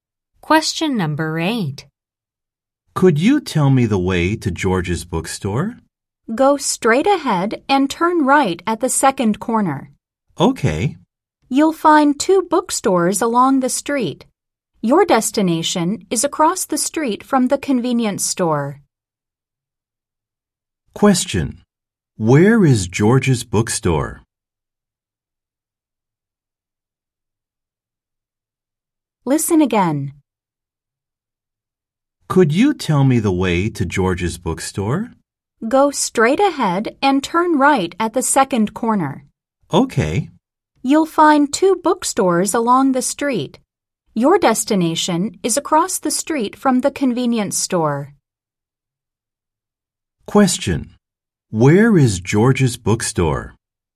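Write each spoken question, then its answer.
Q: Where is George's bookstore?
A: Across the street from the convenience store, after turning right at the second corner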